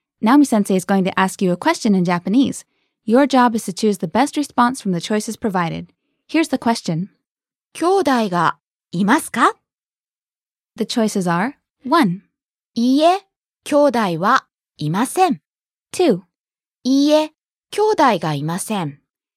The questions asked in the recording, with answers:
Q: 兄弟がいますか?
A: 1. いいえ、兄弟はいません。